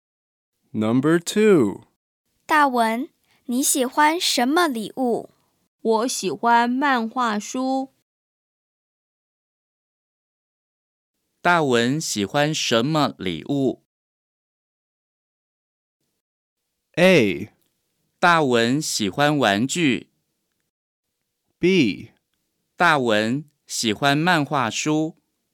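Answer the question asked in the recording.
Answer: B: 大文喜欢漫画书。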